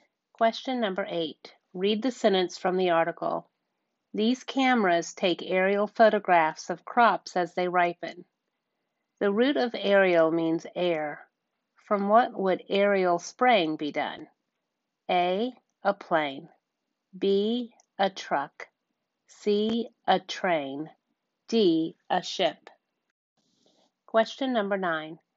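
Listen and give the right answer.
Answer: A: A plane.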